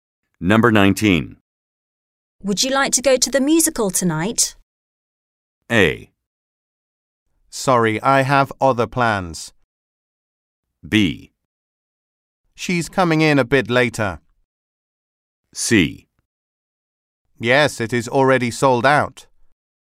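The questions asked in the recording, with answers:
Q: Would you like to go to the musical tonight?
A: A: Sorry, I have other plans.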